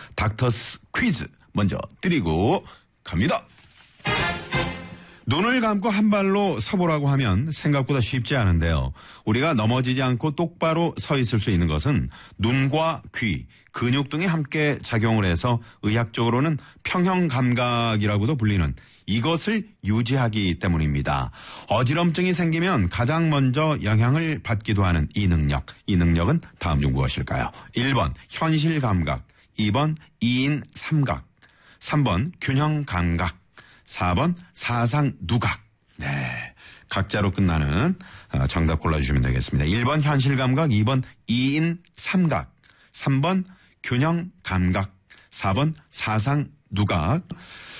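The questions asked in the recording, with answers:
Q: 이 능력은 다음 중 무엇일까요? 1번 현실감각, 2번 이인삼각, 3번 균형감각, 4번 사상누각.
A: 3: 균형감각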